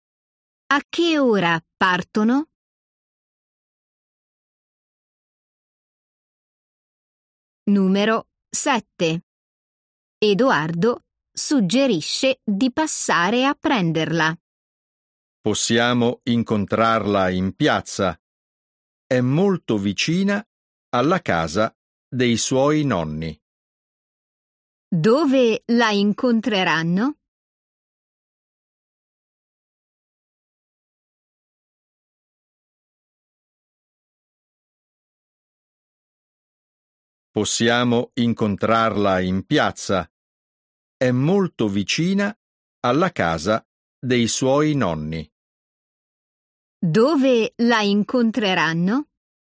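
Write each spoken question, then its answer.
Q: Dove la incontreranno?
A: in piazza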